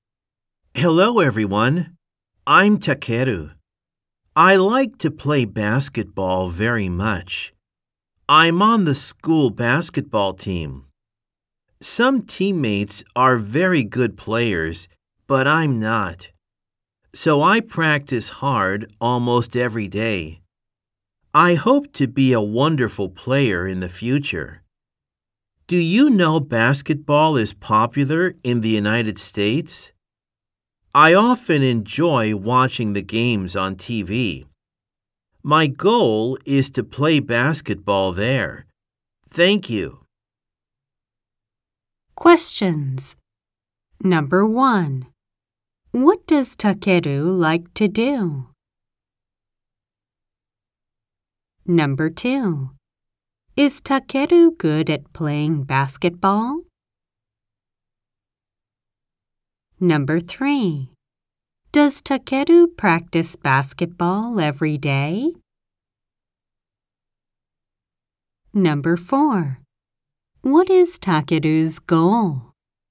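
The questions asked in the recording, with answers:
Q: What does Takeru like to do?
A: He likes to play basketball.

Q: Is Takeru good at playing basketball?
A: No, he isn't.

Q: Does Takeru practice basketball every day?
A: No, he practices almost every day.

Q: What is Takeru's goal?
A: To play basketball in the United States.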